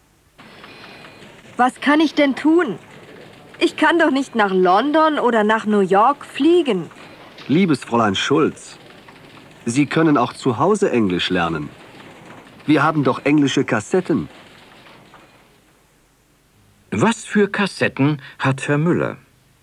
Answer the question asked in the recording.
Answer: Er hat englische Kassetten.